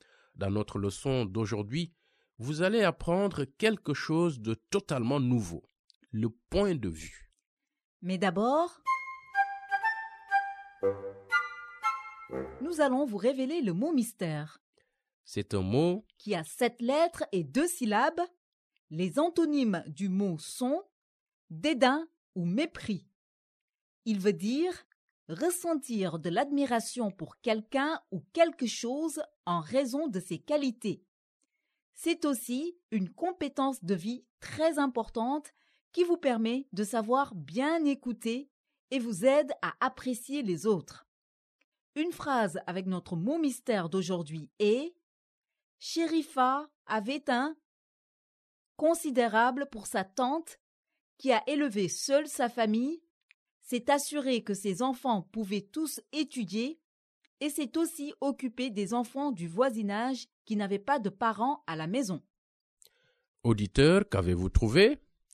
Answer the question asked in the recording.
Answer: Le mot mystère est respect.